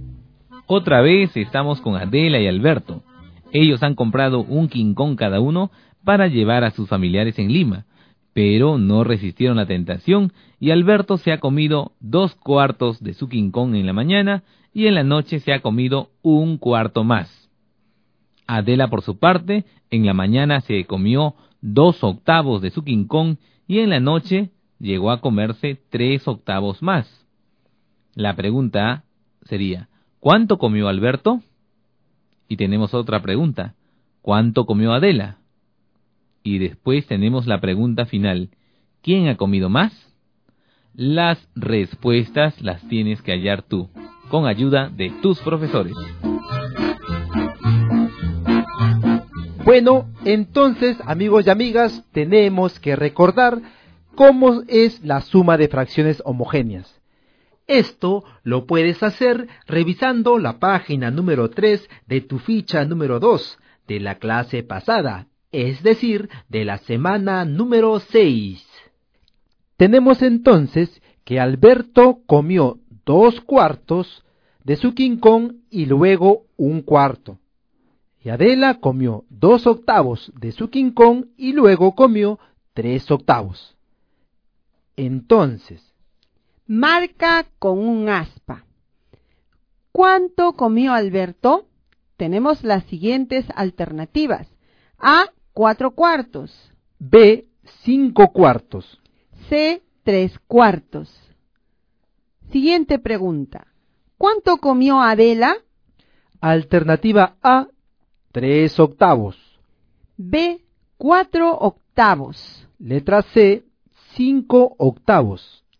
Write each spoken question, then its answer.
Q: ¿Cuánto comió Alberto?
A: Alberto comió las 3/4 de su quincón.

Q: ¿Cuánto comió Adela?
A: Y Adela comió 5/8 de su quincón.